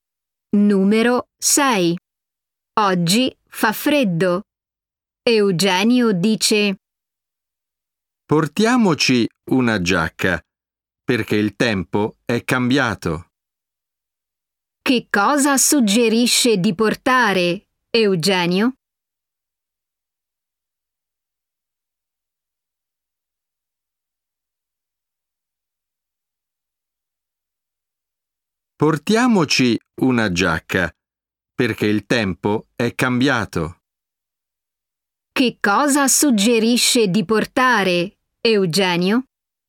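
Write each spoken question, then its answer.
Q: Che cosa suggerisce di portare, Eugenio?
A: una giacca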